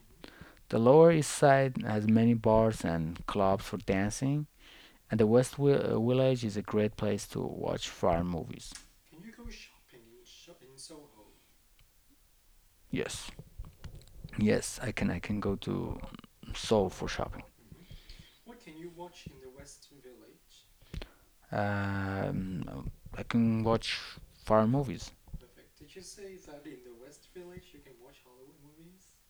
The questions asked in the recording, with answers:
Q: Can you go shopping in Soho?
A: Yes, I can go shopping in Soho.